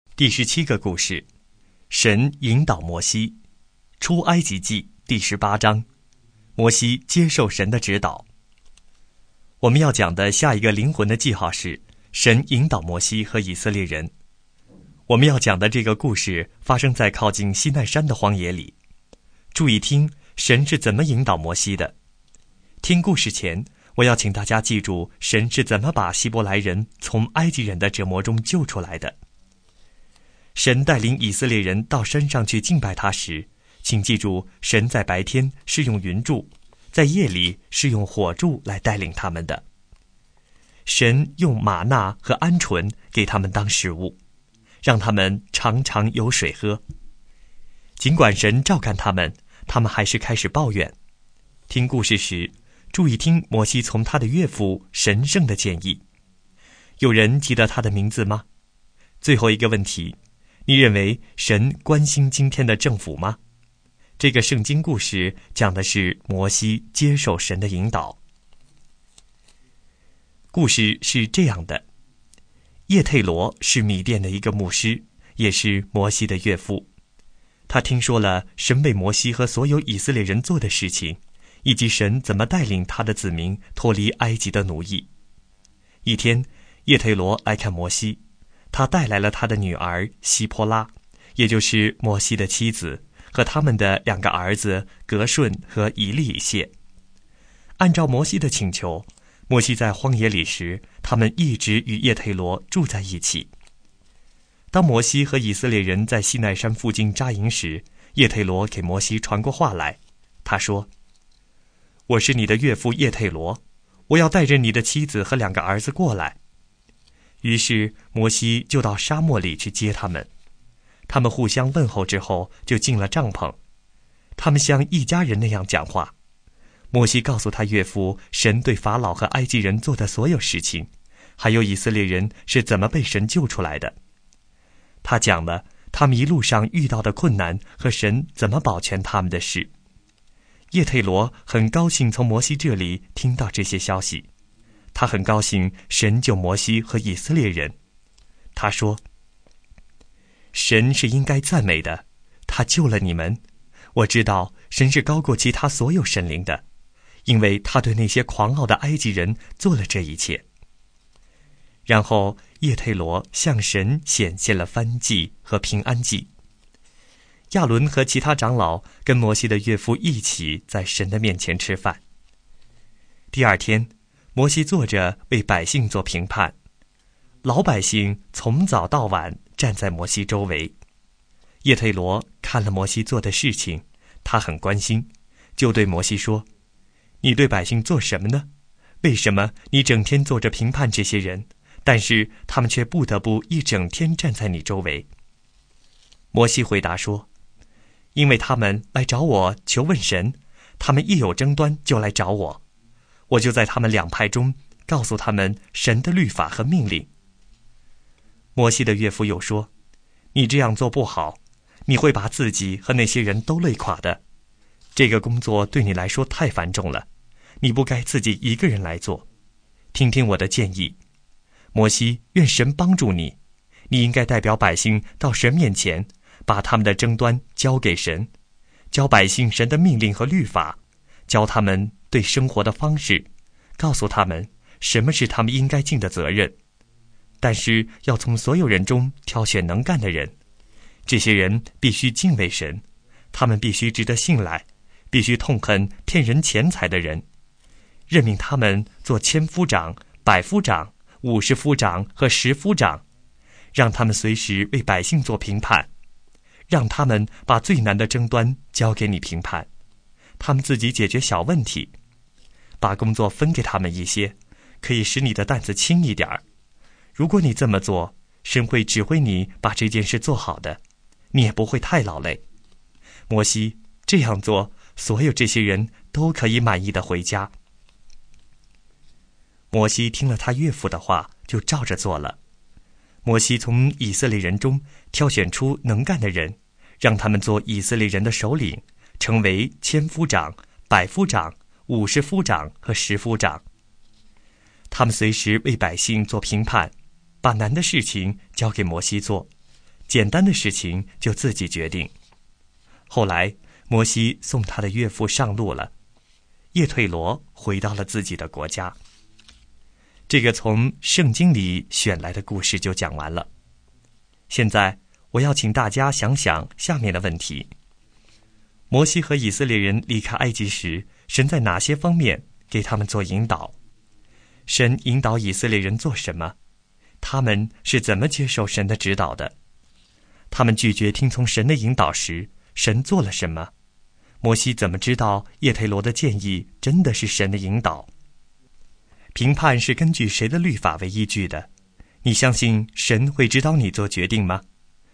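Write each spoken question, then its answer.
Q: 有人记得他的名字吗?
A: 叶忒罗(摩西的岳父)

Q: 评判是根据谁的律法为依据的?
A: 神的律法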